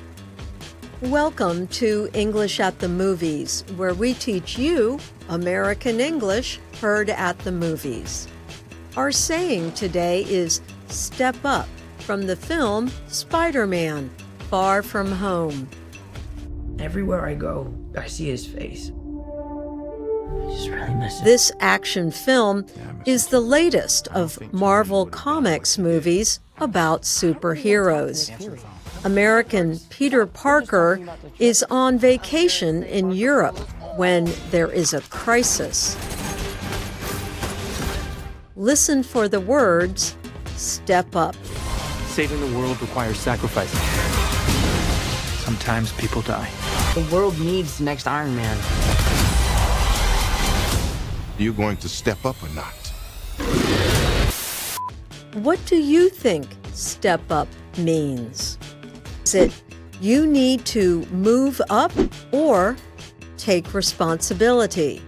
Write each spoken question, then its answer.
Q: What do you think step up means?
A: The answer is take responsibility.